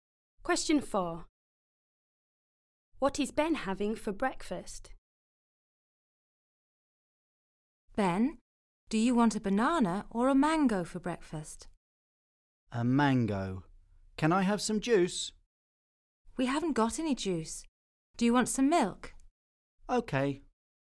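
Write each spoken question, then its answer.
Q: What is Ben having for breakfast?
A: A mango and some milk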